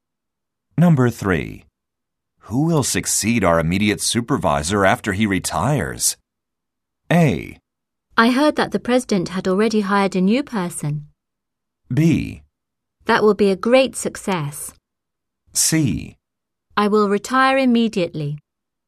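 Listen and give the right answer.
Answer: A: I heard that the president had already hired a new person.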